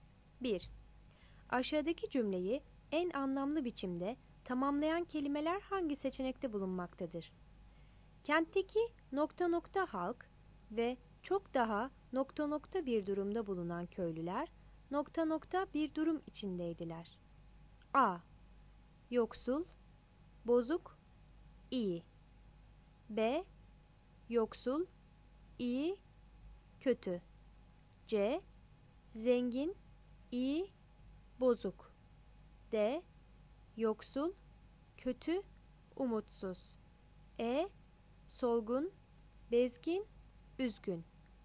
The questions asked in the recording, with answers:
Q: Aşağıdaki cümleyi en anlamlı biçimde tamamlayan kelimeler hangi seçenekte bulunmaktadır?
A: cevap D seçeneğidir.